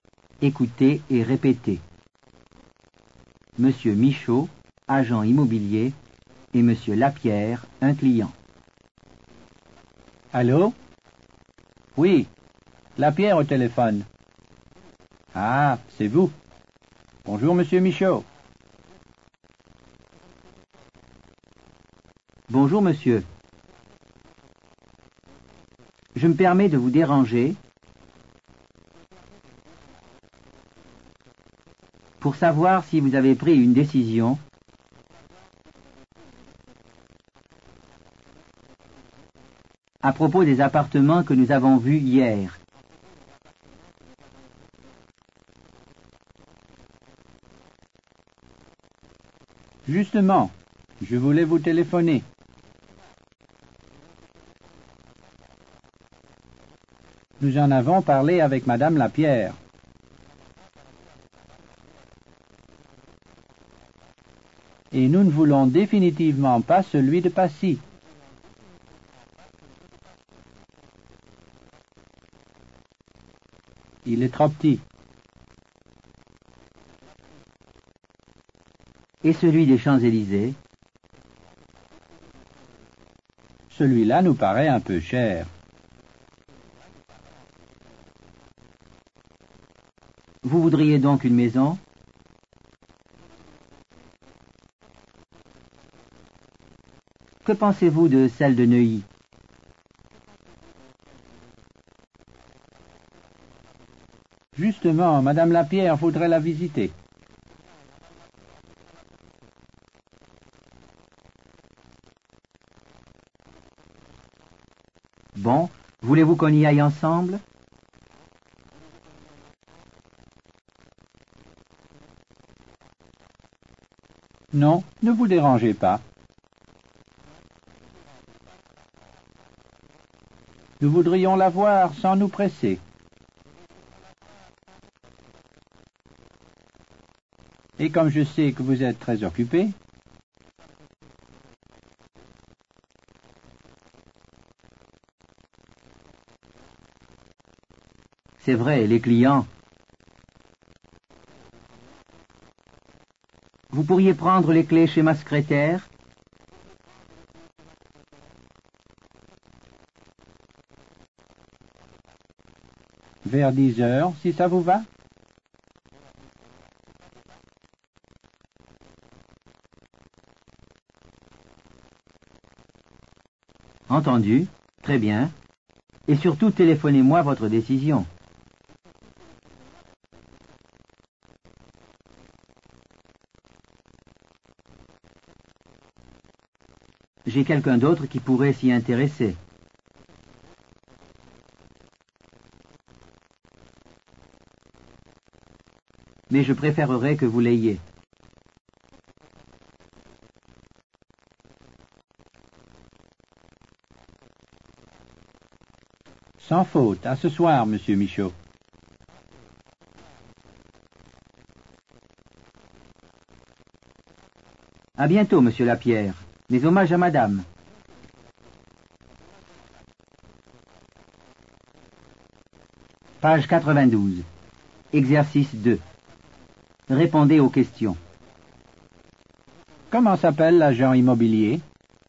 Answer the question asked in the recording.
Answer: L'agent immobilier s'appelle M. Michaud.